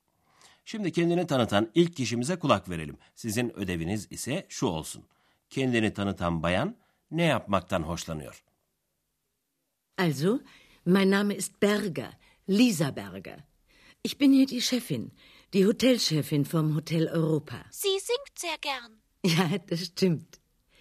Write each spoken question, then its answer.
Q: Kendini tanıtan bayan ne yapmaktan hoşlanıyor?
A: Biraz önce de hemen söze girip Bayan Berger'in şarkı söylemekten hoşlandığını söylemişti.